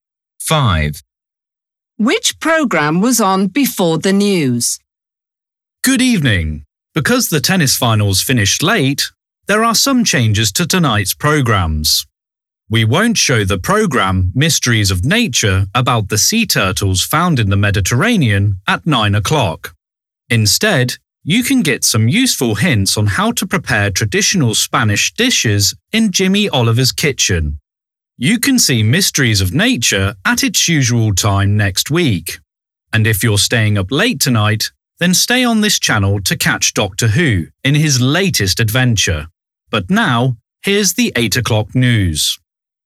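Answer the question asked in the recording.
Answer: The tennis finals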